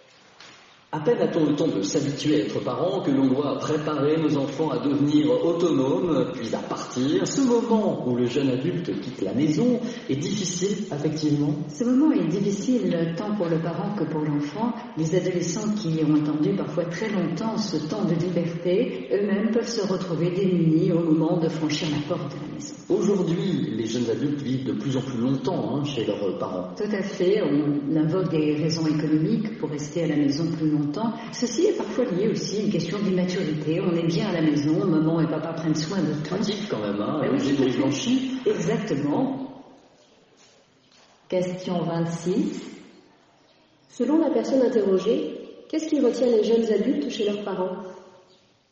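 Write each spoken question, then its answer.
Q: Selon la personne interrogée, qu'est-ce qui retient les jeunes adultes chez leurs parents ?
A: Des raisons économiques, et parfois l'immaturité (le confort de la maison où les parents s'occupent de tout)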